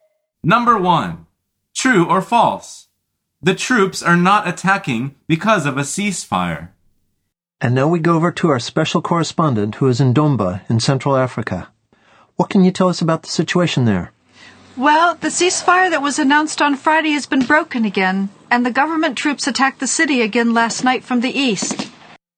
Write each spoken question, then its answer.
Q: True or false? The troops are not attacking because of a ceasefire.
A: The answer is false.